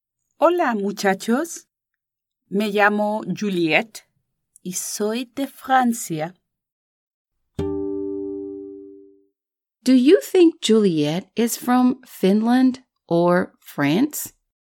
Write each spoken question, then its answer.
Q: Do you think Juliet is from Finland or France?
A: Ella es de Francia y habla francés.